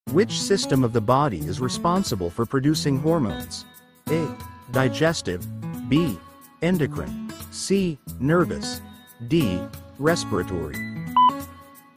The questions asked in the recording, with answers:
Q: Which system of the body is responsible for producing hormones?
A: The answer is B. Endocrine.